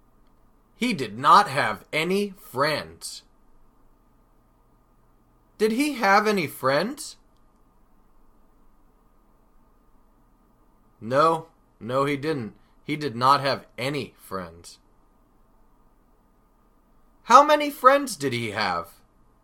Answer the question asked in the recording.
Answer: Well, he did not have any friends, so that means he had zero friends.